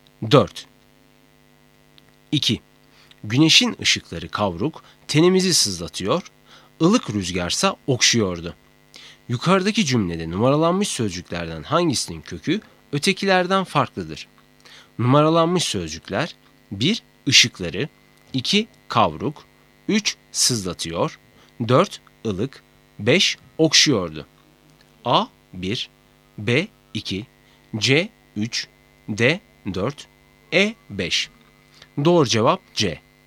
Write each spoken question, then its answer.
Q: Yukarıdaki cümlede numaralanmış sözcüklerden hangisinin kökü ötekilerden farklıdır?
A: Doğru cevap C. 3